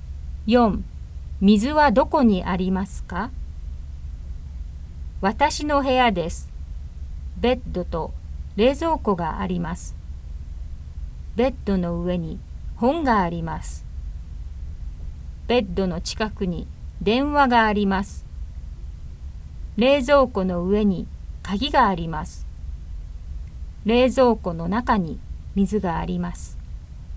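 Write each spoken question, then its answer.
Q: 水はどこにありますか?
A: 冷蔵庫の中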